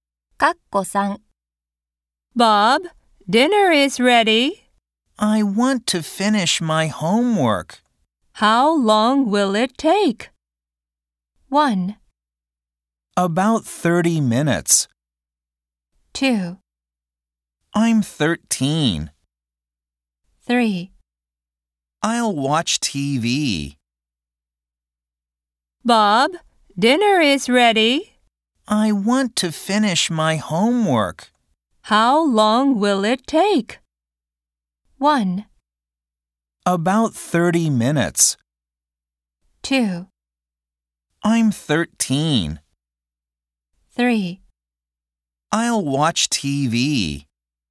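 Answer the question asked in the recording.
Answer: 1: About 30 minutes.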